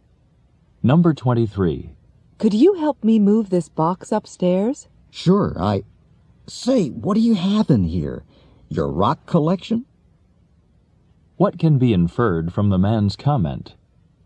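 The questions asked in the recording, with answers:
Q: What can be inferred from the man's comment?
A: The box is very heavy.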